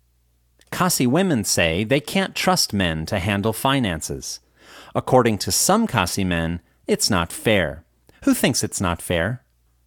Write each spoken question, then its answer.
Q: Who thinks it's not fair?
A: Some Khasi men think that it's not fair.